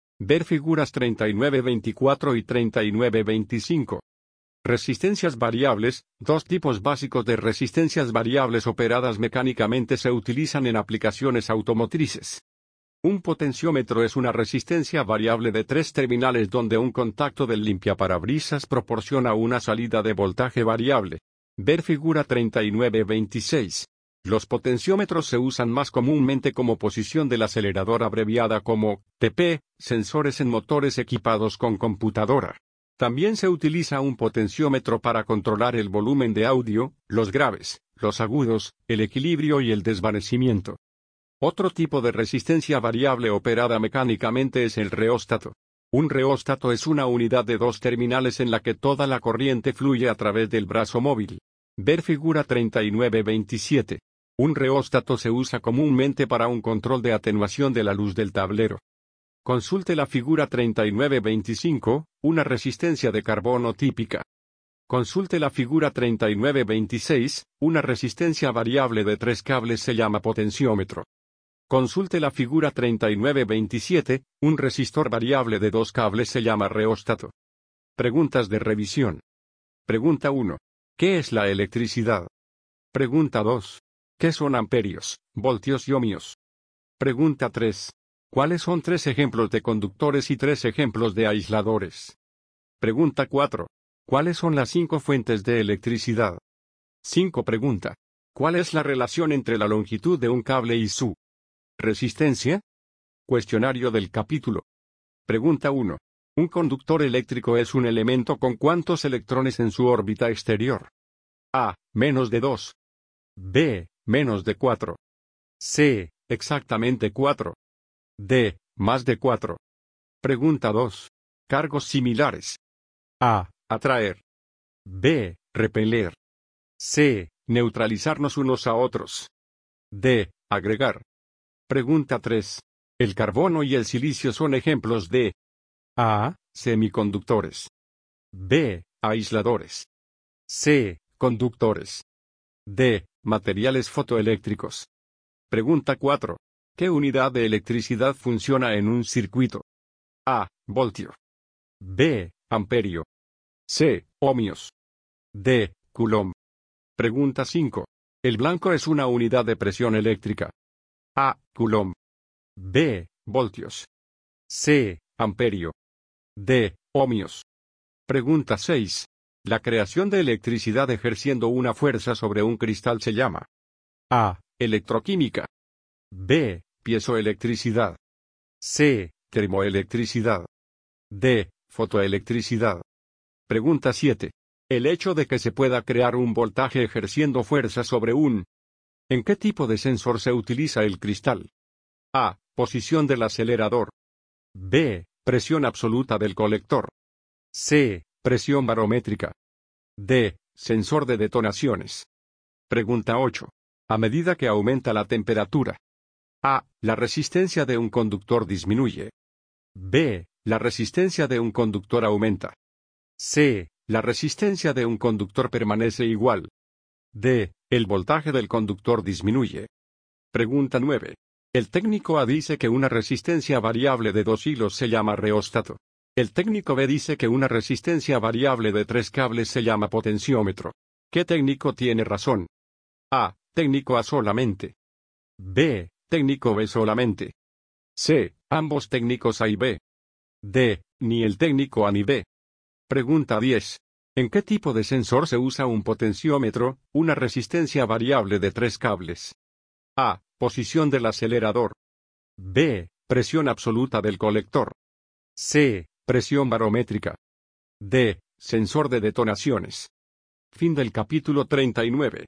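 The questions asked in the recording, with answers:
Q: ¿Qué técnico tiene razón?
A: C: Ambos técnicos A y B

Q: ¿En qué tipo de sensor se usa un potenciómetro, una resistencia variable de tres cables?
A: A: Posición del acelerador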